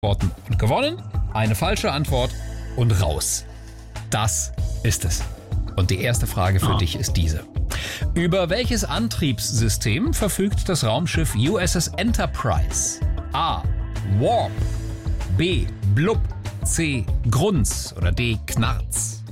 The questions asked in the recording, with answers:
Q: Über welches Antriebssystem verfügt das Raumschiff USS Enterprise?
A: Das ist A. Warp.